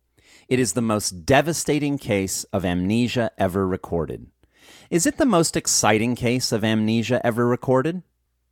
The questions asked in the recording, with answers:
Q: Is it the most exciting case of amnesia ever recorded?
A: No, it isn't the most exciting case of amnesia ever recorded.